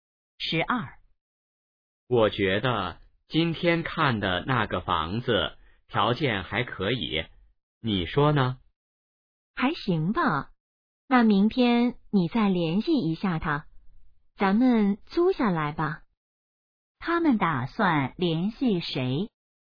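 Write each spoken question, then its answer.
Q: 他们打算联系谁?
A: 房东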